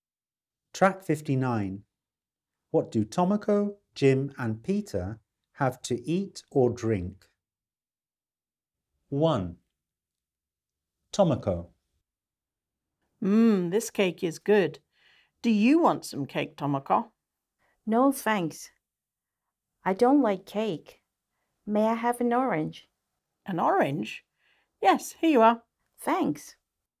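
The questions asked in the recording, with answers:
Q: What do Tomoko, Jim and Peter have to eat or drink?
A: An orange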